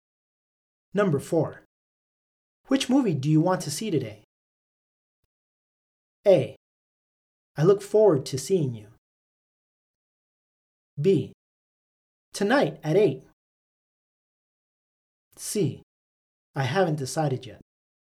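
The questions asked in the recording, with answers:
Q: Which movie do you want to see today?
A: C: I haven't decided yet.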